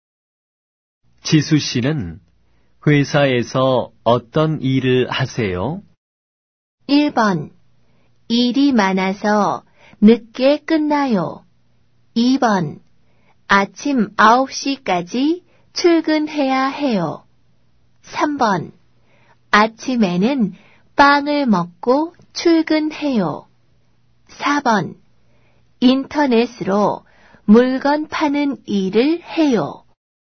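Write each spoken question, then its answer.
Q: 지수 씨는 회사에서 어떤 일을 하세요?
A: 4: 인터넷으로 물건 파는 일을 해요.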